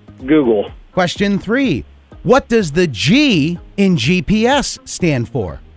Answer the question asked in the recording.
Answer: Global.